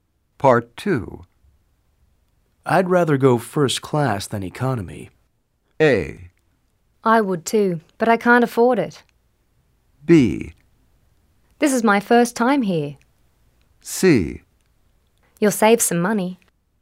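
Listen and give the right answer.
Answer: A: I would too, but I can't afford it.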